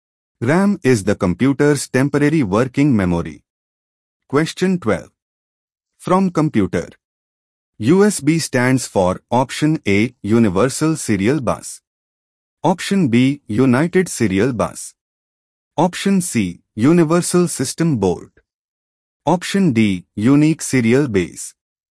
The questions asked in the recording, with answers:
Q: USB stands for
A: The correct answer is option A, universal serial bus.